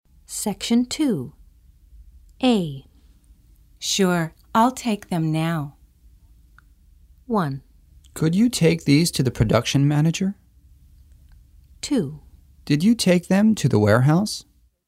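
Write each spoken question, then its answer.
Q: Sure, I'll take them now.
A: 1: Could you take these to the production manager?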